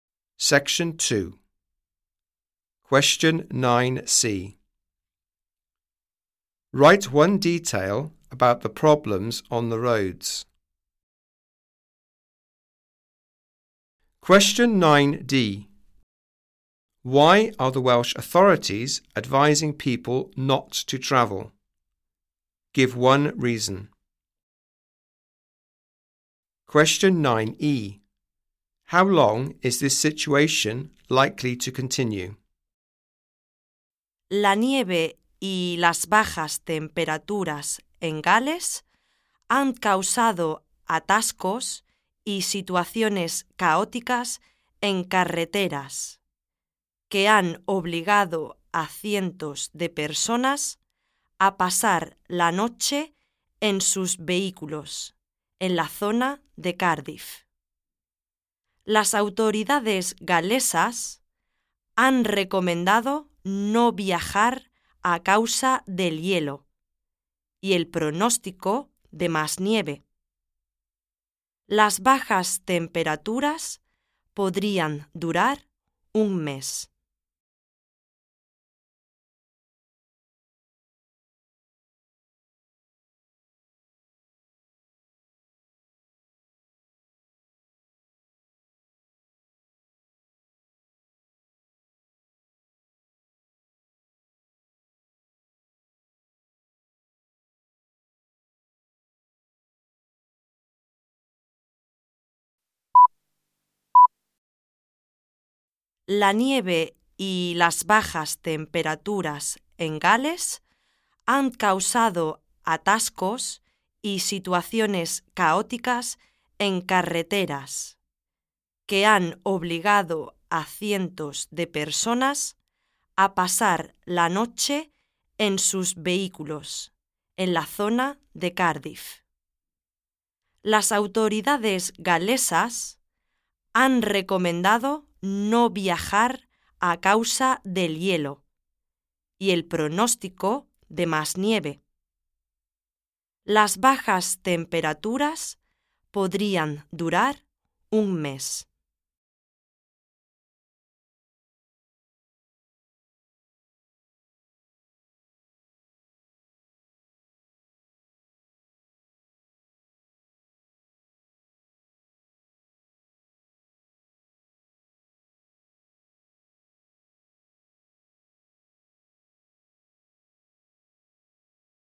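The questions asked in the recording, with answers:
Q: Write one detail about the problems on the roads.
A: Traffic jams; hundreds of people spent the night in their vehicles near Cardiff

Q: Why are the Welsh authorities advising people not to travel?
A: Because of ice and the forecast of more snow

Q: How long is this situation likely to continue?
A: A month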